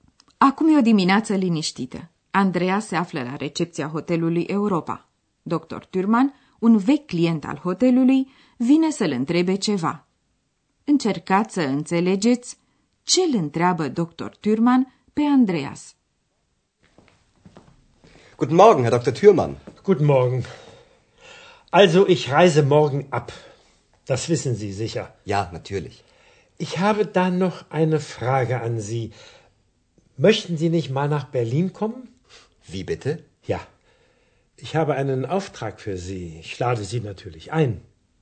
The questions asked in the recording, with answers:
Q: Încercați să înțelegeți ce îl întreabă Dr.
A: Dr. Thürmann pleacă și îl întreabă pe Andreas dacă nu vrea să vină la Berlin.